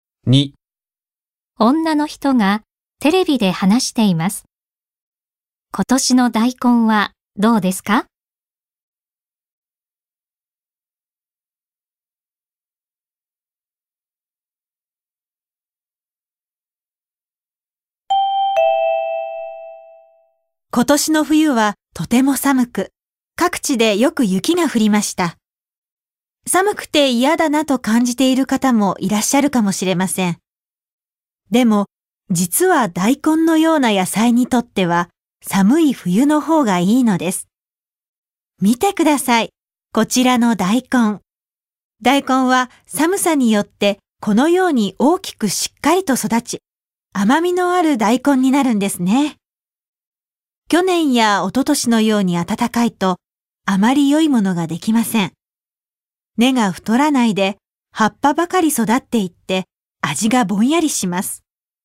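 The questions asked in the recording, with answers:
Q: 今年の大根はどうですか?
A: 寒さで大きくしっかり育ち、甘い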